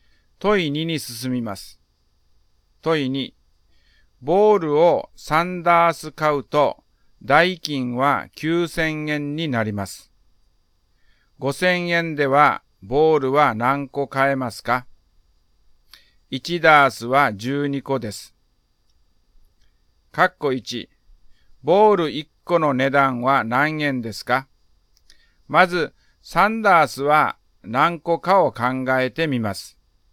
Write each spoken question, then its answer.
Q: 括弧1、ボール1個の値段は何円ですか?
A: 1個250円です。